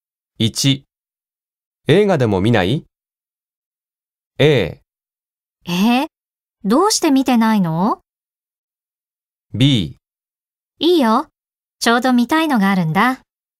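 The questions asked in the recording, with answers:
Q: 映画でも見ない ?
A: B: いいよ、ちょうど見たいのがあるんだ。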